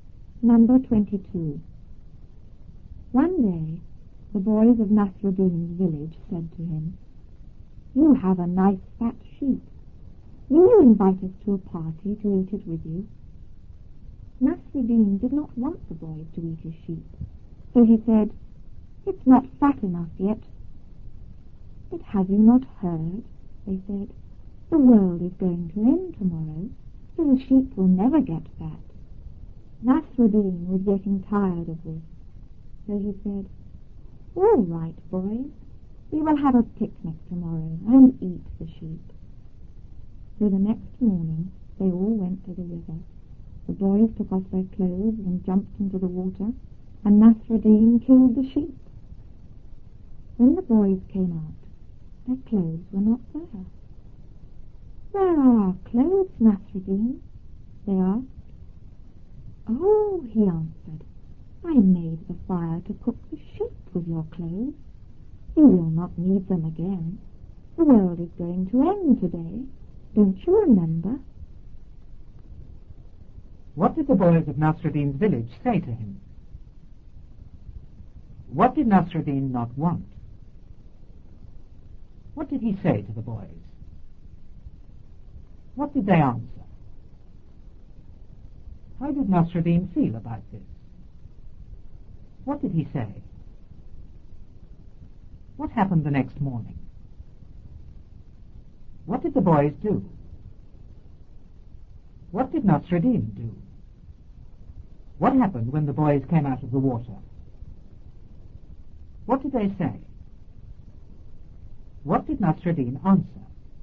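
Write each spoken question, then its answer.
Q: What did the boys of Nasruddin's village say to him?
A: That he had a nice fat sheep and asked him to invite them to a party to eat it

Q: What did Nasruddin not want?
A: He did not want the boys to eat his sheep

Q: What did he say to the boys?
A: It's not fat enough yet

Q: What did they answer?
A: The world is going to end tomorrow, so the sheep will never get fat

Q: How did Nasruddin feel about this?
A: He was getting tired of it

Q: What did he say?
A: All right, we will have a picnic tomorrow and eat the sheep

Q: What happened the next morning?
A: They all went to the river

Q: What did the boys do?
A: They took off their clothes and jumped into the water

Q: What did Nasruddin do?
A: He killed the sheep

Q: What happened when the boys came out of the water?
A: Their clothes were not there

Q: What did they say?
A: Where are our clothes, Nasruddin?

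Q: What did Nasruddin answer?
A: He had used their clothes to make the fire to cook the sheep; they would not need them because the world was ending today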